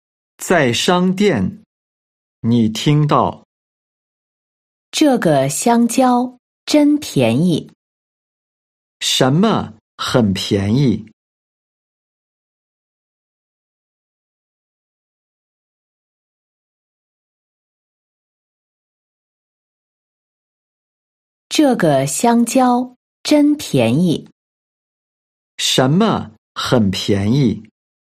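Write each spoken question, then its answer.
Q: 什么很便宜?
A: 香蕉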